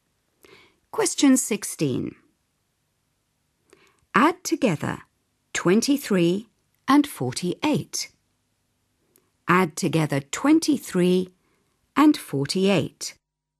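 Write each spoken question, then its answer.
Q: Add together 23 and 48.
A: 71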